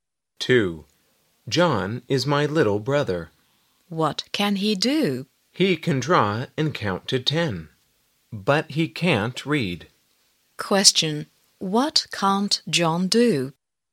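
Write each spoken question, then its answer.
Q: What can't John do?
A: He can't read.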